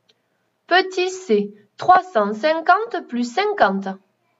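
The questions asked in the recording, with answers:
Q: Petit C, 350 plus 50.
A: 400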